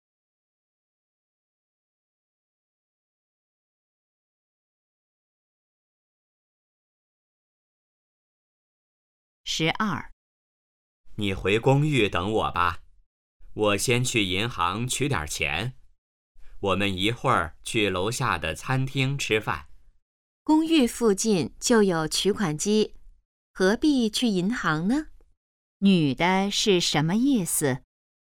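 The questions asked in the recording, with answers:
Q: 女的是什么意思?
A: 不必去银行,公寓附近就有取款机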